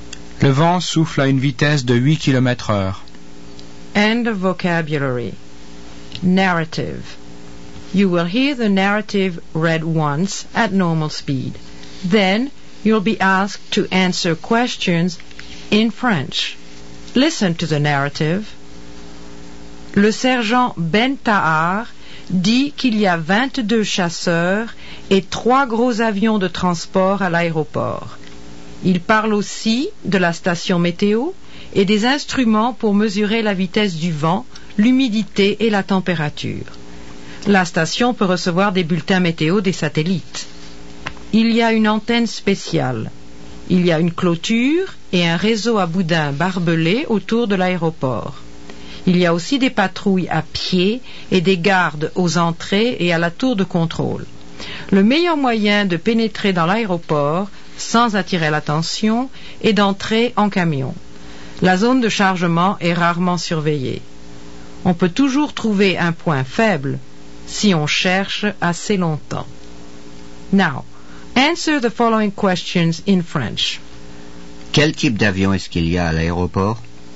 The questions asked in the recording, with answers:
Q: Quel type d'avion est-ce qu'il y a à l'aéroport?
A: Il y a des MiG-23 et des avions de transport.